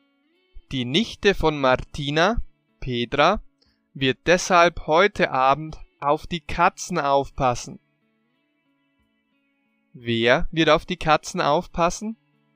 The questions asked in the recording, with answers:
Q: Wer wird auf die Katzen aufpassen?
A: Petra. Die Nichte von Martina, Petra, wird deshalb heute Abend auf die Katzen aufpassen.